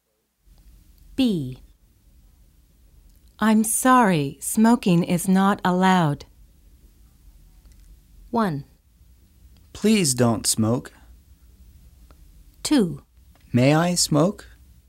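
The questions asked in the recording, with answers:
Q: I'm sorry, smoking is not allowed.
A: 2: May I smoke?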